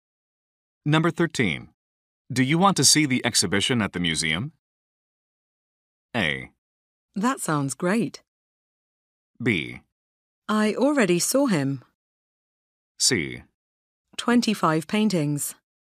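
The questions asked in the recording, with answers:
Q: Do you want to see the exhibition at the museum?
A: A: That sounds great.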